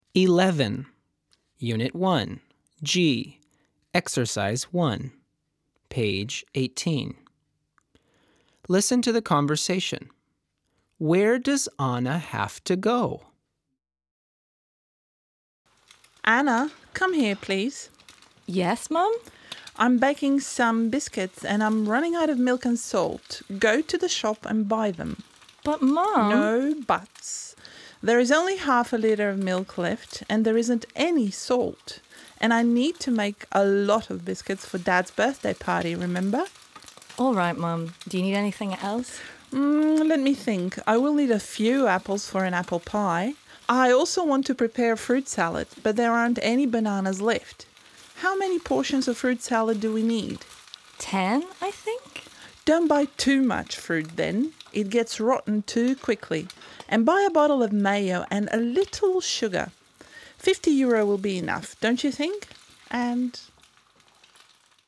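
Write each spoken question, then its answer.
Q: Where does Anna have to go?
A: To the shop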